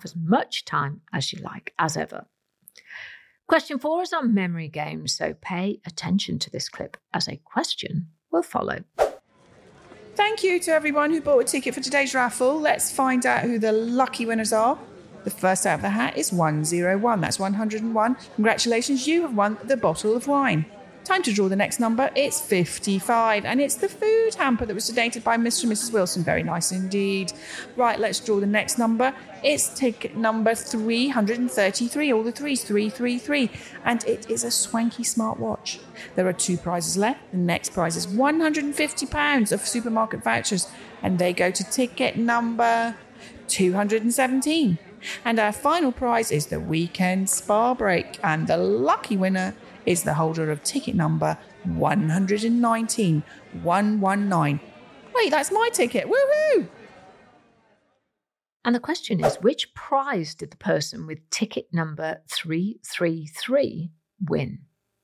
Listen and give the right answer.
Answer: They won a smartwatch.